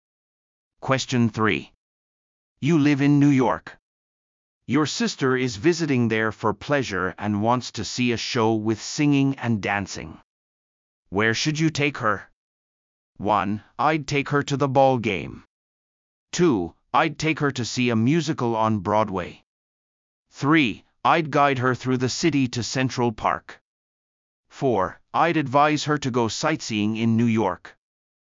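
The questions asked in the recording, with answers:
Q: Where should you take her?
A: 2: I'd take her to see a musical on Broadway.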